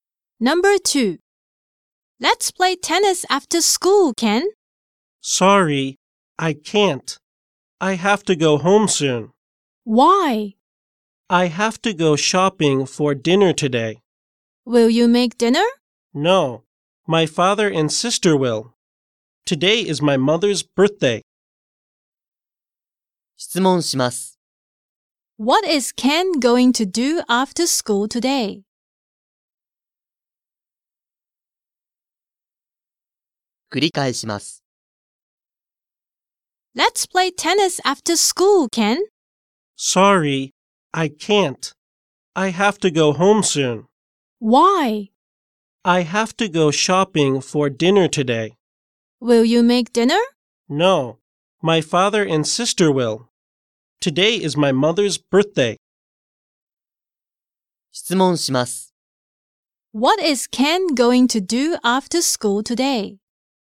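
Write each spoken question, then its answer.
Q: What is Ken going to do after school today?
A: He is going to go shopping for dinner.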